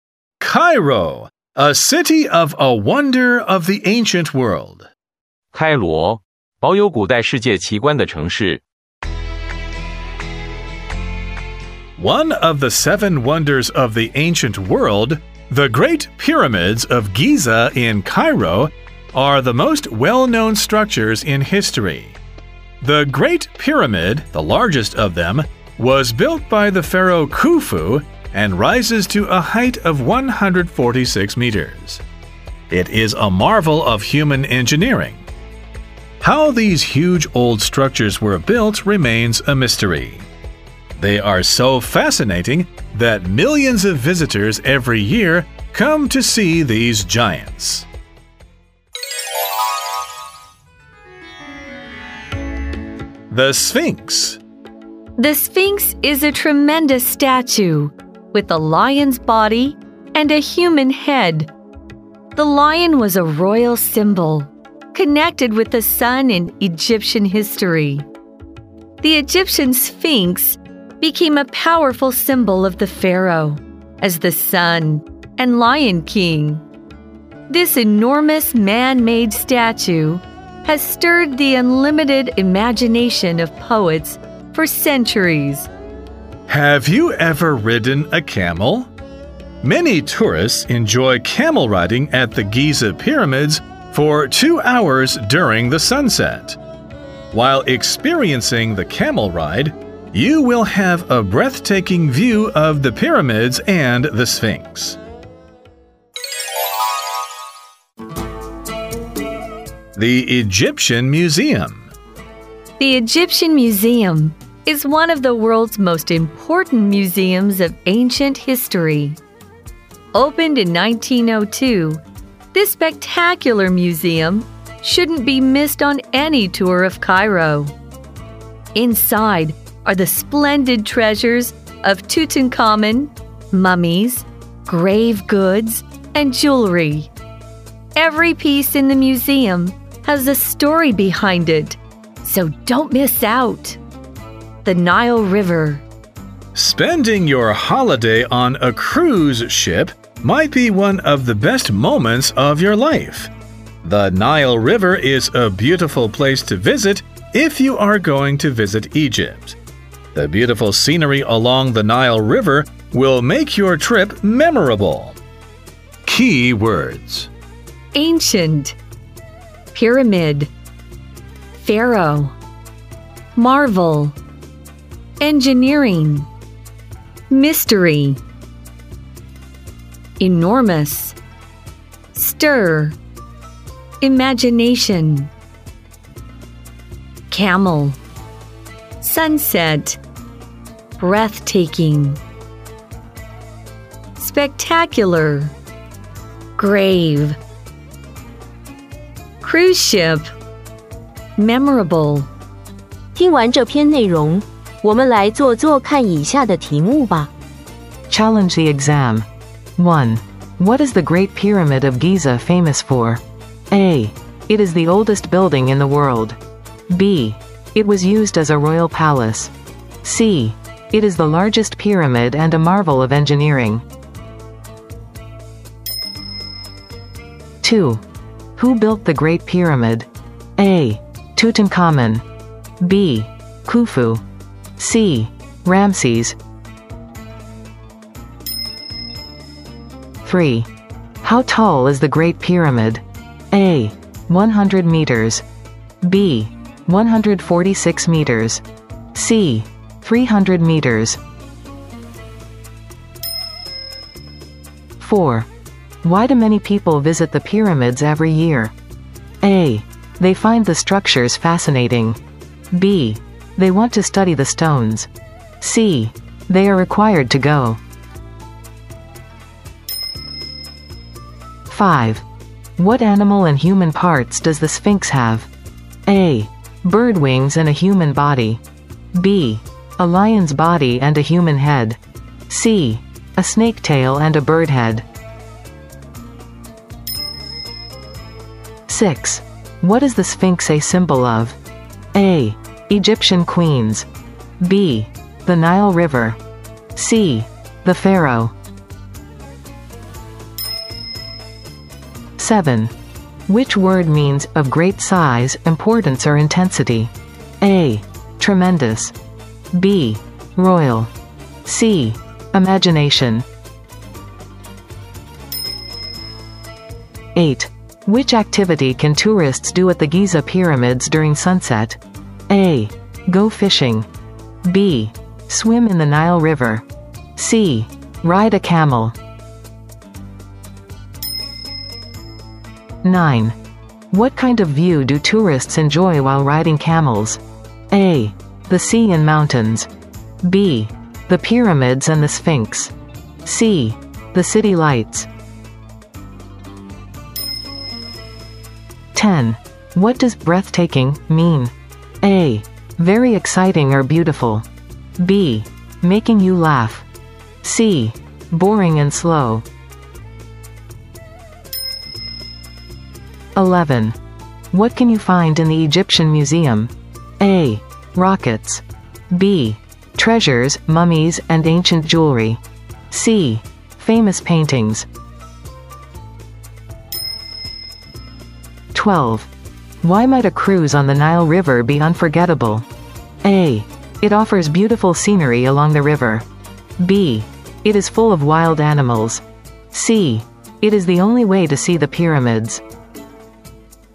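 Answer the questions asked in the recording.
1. C: It is the largest pyramid and a marvel of engineering.
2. B: Khufu.
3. B: 146 meters.
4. A: They find the structures fascinating.
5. B: A lion's body and a human head.
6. C: The Pharaoh.
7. A: Tremendous.
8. C: Ride a camel.
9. B: The pyramids and the Sphinx.
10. A: Very exciting or beautiful.
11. B: Treasures, mummies, and ancient jewelry.
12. A: It offers beautiful scenery along the river.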